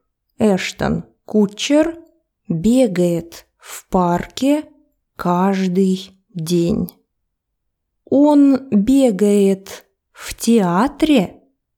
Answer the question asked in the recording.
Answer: Нет. Он бегает в парке.